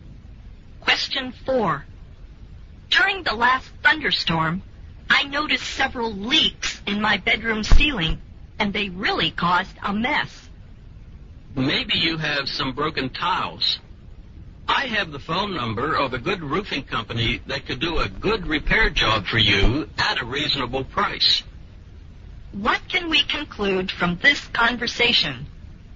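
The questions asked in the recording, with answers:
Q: What can we conclude from this conversation?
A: The roof leaks, probably because of broken tiles, and needs to be repaired.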